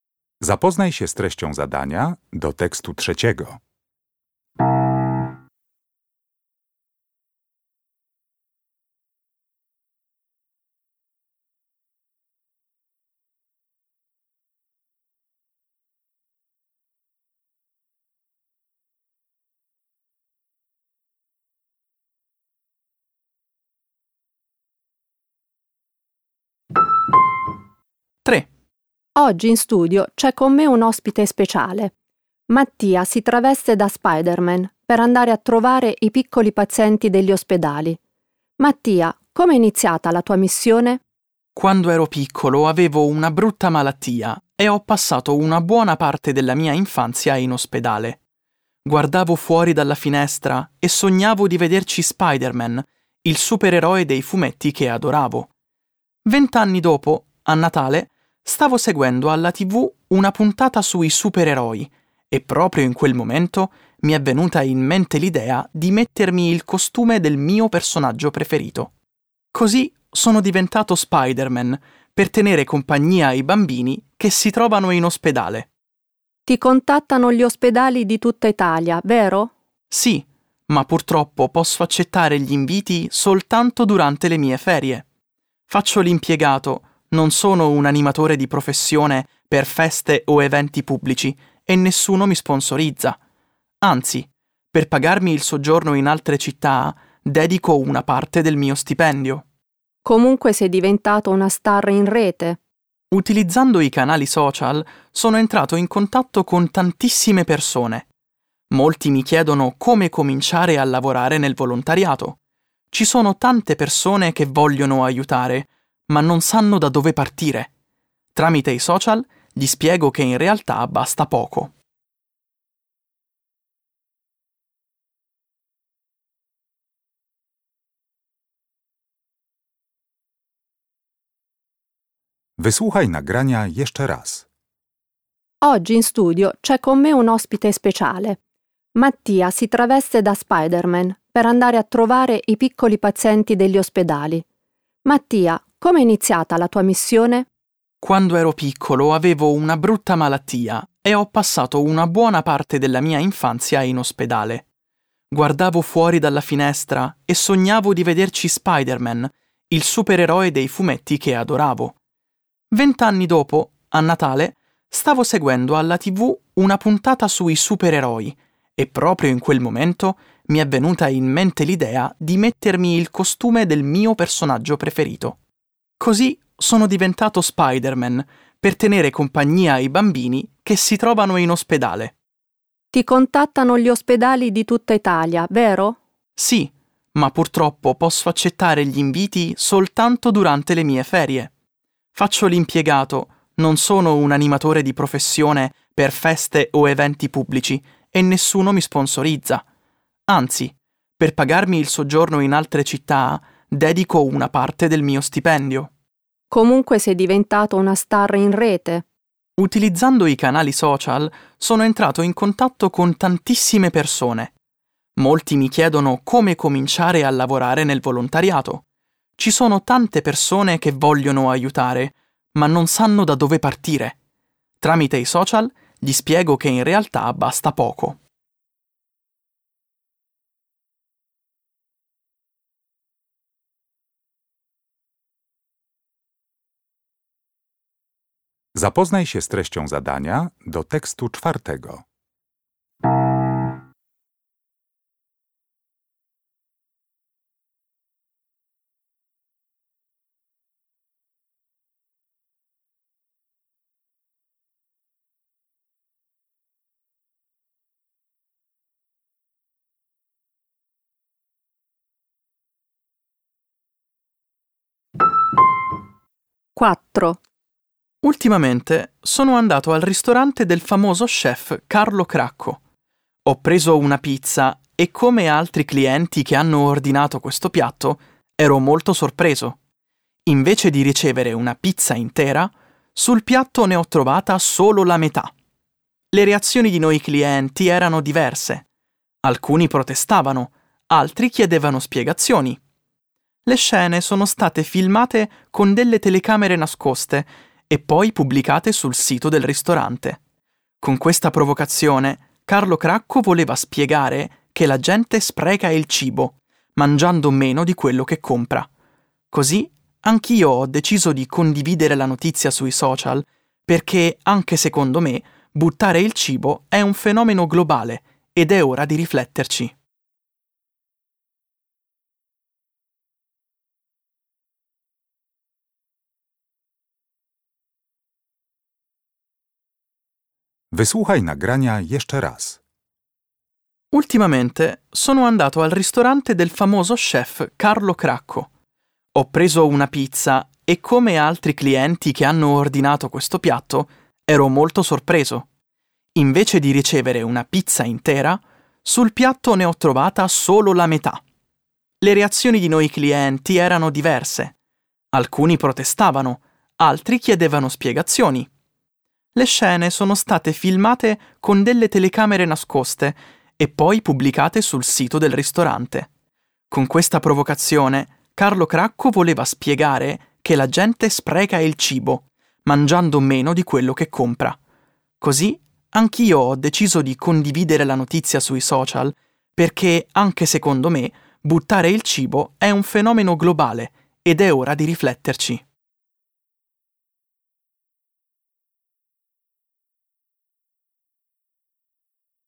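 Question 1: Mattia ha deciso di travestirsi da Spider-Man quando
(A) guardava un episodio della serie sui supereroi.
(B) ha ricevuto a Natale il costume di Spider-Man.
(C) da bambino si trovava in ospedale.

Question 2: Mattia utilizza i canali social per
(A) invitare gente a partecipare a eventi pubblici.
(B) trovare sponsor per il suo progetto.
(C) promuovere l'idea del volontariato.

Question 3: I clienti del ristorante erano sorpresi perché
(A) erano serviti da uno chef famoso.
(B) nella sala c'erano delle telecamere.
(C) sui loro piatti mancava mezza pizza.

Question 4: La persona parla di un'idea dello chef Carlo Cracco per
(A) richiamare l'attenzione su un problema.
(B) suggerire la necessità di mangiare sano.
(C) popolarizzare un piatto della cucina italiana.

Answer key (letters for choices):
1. A
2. C
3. C
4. A

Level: Poziom: podstawowy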